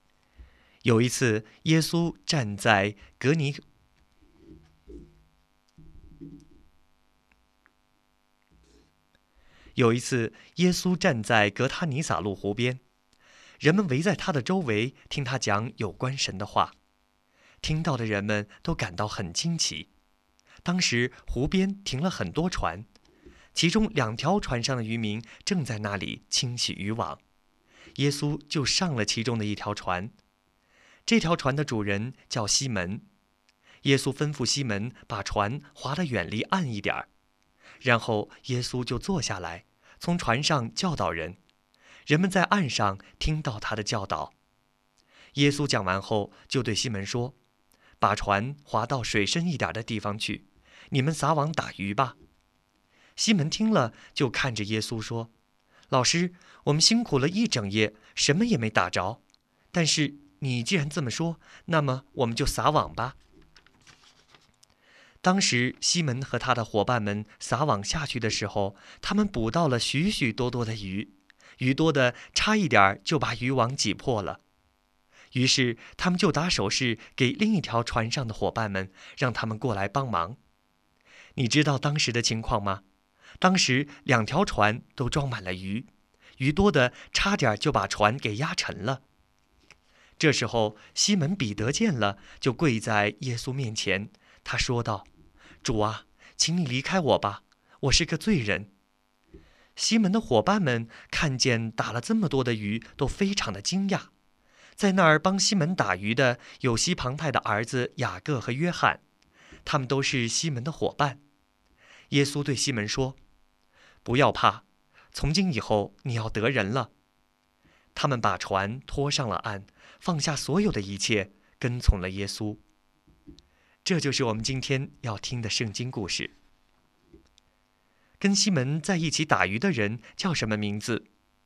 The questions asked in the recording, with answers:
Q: 跟西门在一起打鱼的人叫什么名字?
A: 西门彼得、雅各和约翰都在湖边打鱼。